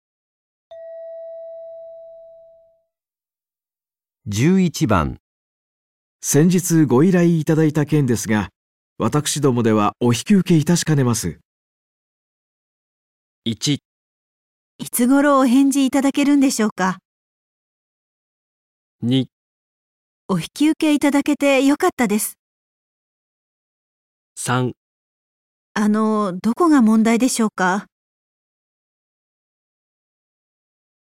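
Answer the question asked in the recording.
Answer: あの、どこが問題でしょうか。

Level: N2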